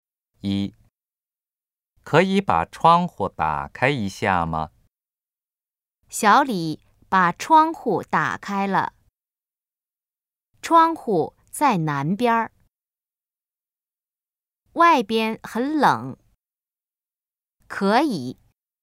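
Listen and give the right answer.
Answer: 可以。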